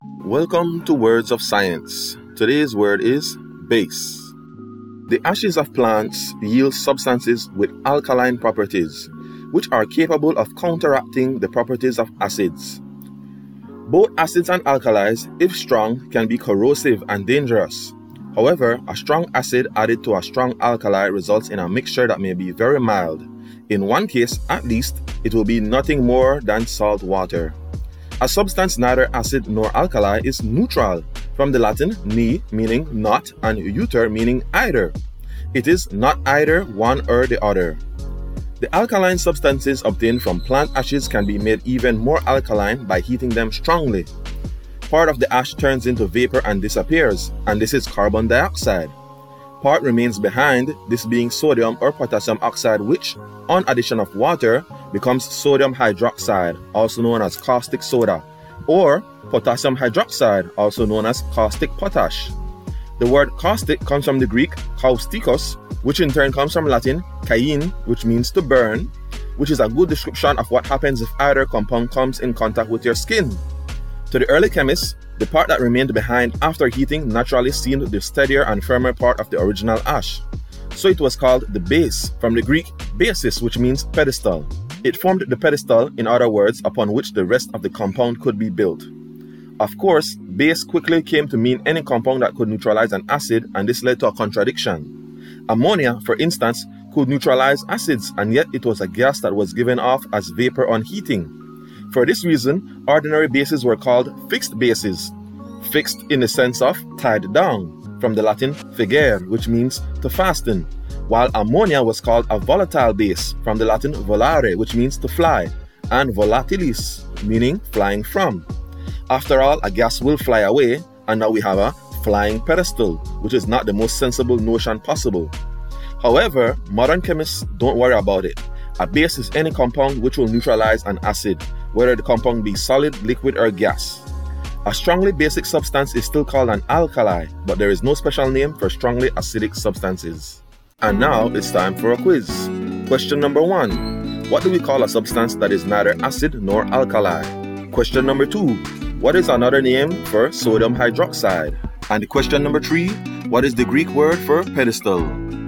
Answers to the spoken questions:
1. for question number one, neutral.
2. For question number two, caustic soda.
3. And for question number three, basis.